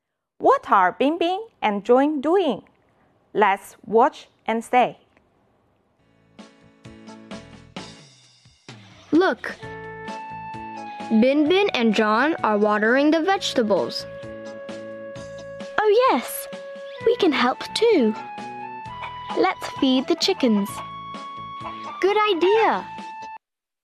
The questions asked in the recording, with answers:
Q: What are Bingbing and Jun doing?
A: They are watering the vegetables.